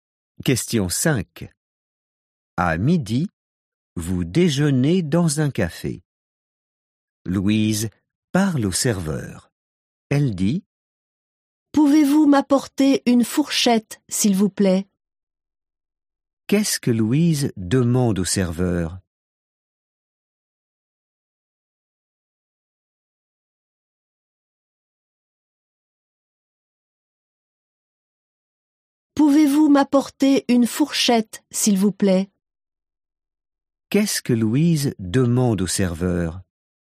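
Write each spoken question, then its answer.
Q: Qu'est-ce que Louise demande au serveur?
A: Une fourchette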